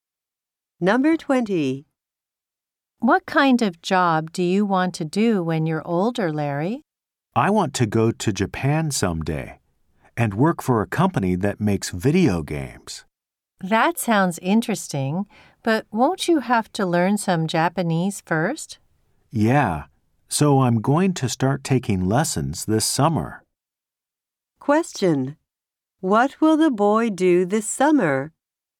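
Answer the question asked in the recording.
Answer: Start taking Japanese lessons.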